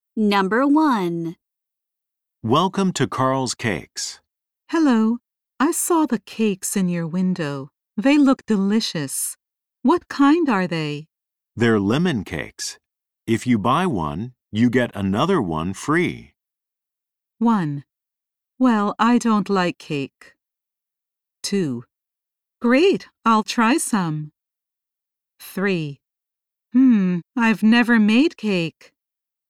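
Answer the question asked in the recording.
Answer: 2: Great, I'll try some.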